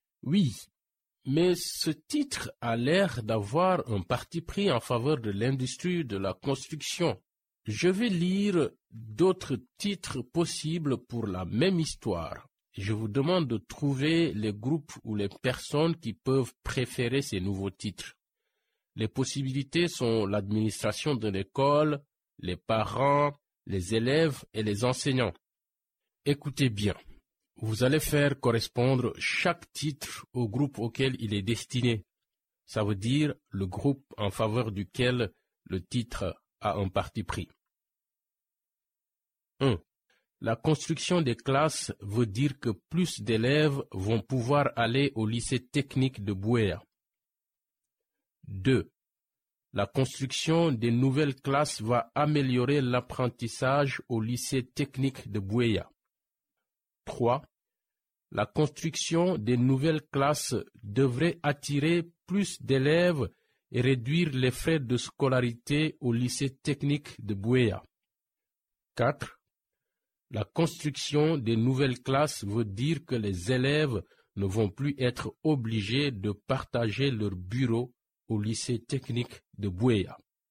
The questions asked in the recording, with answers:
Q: La construction des classes veut dire que plus d'élèves vont pouvoir aller au lycée technique de Bouéa.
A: À mon avis, le premier est pour les administrateurs de l'école.

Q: La construction des nouvelles classes va améliorer l'apprentissage au lycée technique de Bouéa.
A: Et le numéro 2, c'est pour les enseignants?

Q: La construction des nouvelles classes devrait attirer plus d'élèves et réduire les frais de scolarité au lycée technique de Bouéa.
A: Je pense que les parents vont aimer celui-là.

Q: La construction des nouvelles classes veut dire que les élèves ne vont plus être obligés de partager leur bureau au lycée technique de Bouéa.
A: Aux élèves, car on est les seuls à nous préoccuper de partager les bureaux.